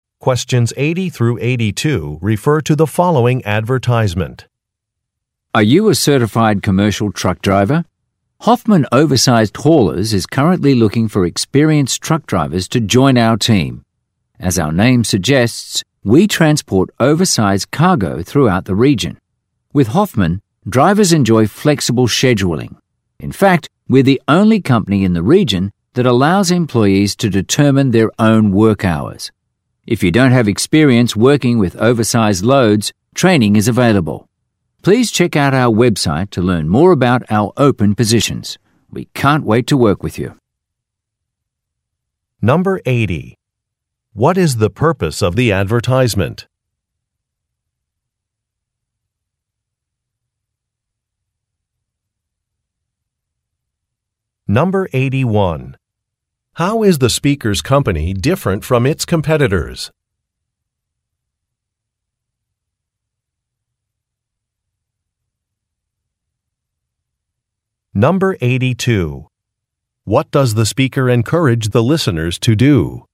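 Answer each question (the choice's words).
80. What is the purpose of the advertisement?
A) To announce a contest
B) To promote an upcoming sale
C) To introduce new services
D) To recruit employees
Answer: To recruit employees

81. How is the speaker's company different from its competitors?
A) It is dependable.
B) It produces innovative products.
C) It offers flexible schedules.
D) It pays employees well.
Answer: It offers flexible schedules.

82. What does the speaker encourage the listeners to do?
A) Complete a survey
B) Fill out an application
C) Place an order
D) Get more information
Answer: Get more information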